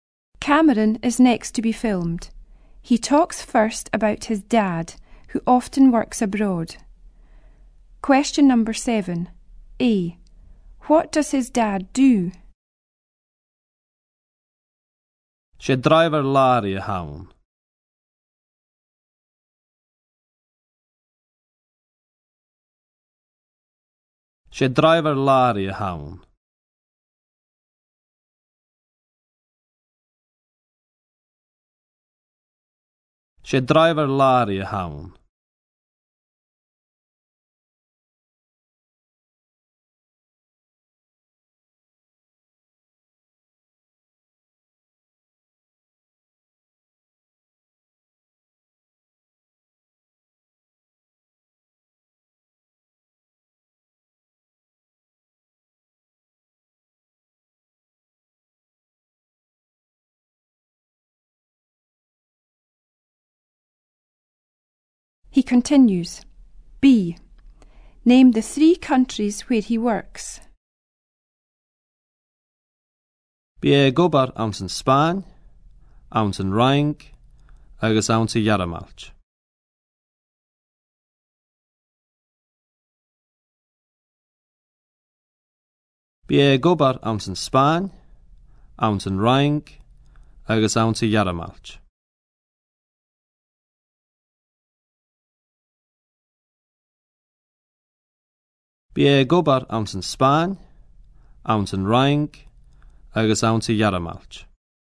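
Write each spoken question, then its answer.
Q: What does his dad do?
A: Lorry driver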